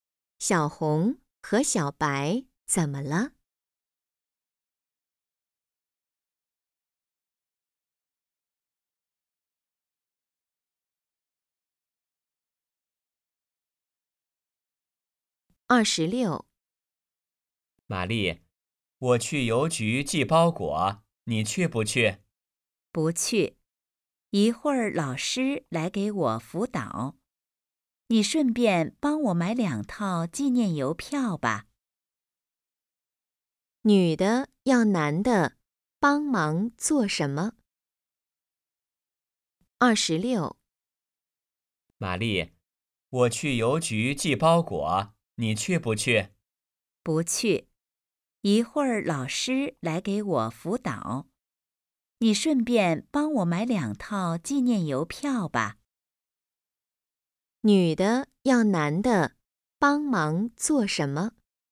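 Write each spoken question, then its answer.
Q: 女的要男的帮忙做什么?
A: 买两套纪念邮票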